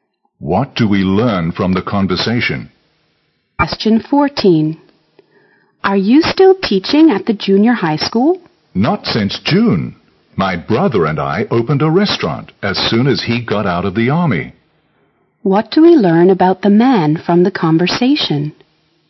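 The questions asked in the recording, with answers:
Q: What do we learn about the man from the conversation?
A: He stopped teaching in June and now runs a restaurant with his brother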